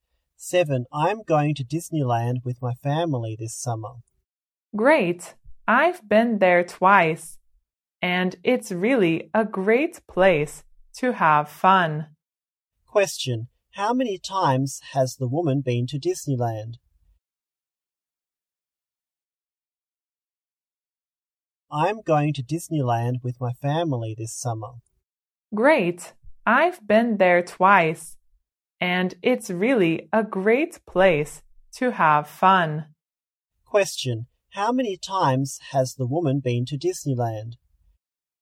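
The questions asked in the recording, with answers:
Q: how many times has the woman been to Disneyland?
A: Twice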